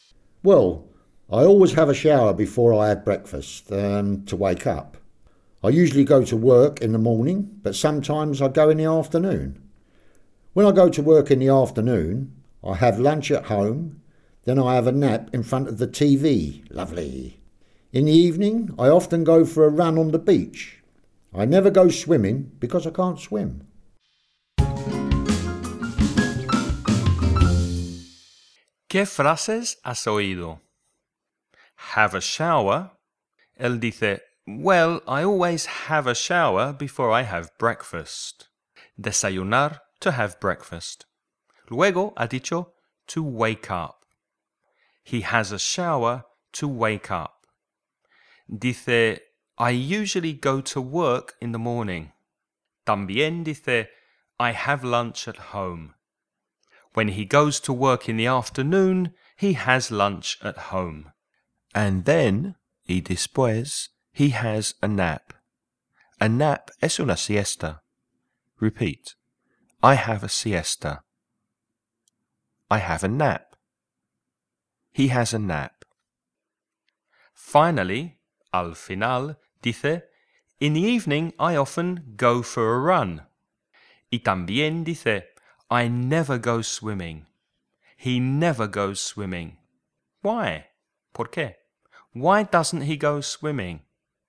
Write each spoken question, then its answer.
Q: Why doesn't he go swimming?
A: Because he can't swim.